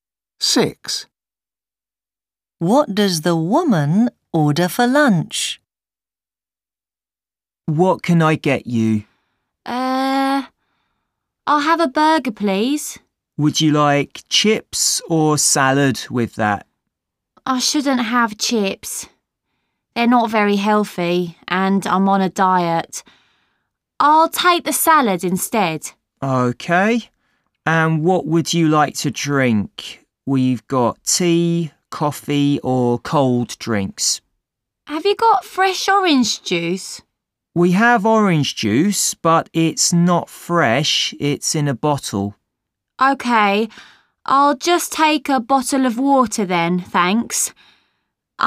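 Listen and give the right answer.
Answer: A burger with salad and a bottle of water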